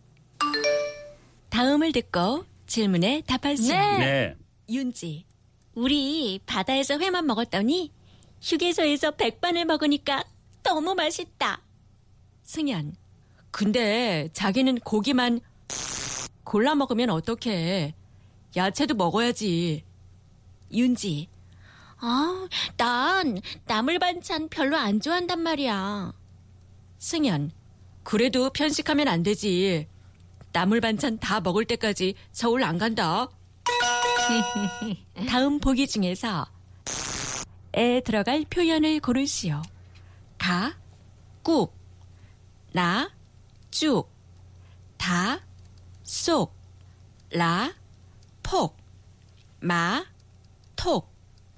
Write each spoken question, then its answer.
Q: 다음 보기 중에서 에 들어갈 표현을 고르시오.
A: Ta, sok, picking.